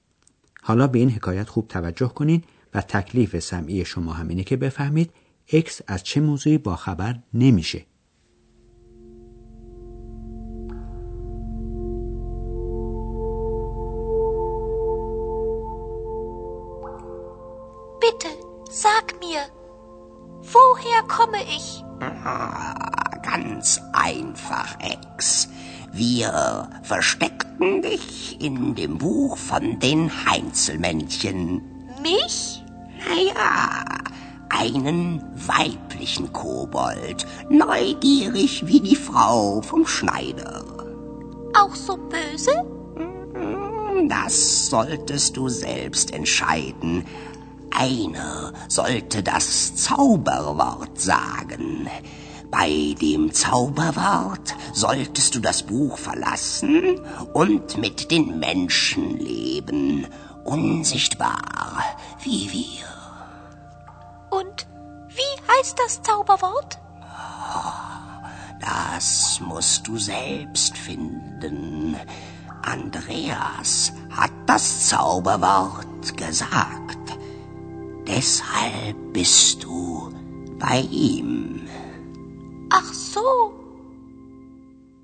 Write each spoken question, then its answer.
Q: حالا به این حکایت خوب توجه کنین و تکلیف سمعی شما همینه که بفهمید اکس از چه موضوعی با خبر نمیشه.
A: پس آندراس کلمه جادو یا وردی رو که باعث بیرون آمدن اکس از لای کتاب بود به زبون آورد، ولی اکس اطلاع پیدا نمی‌کنه که این کلمه چی بود.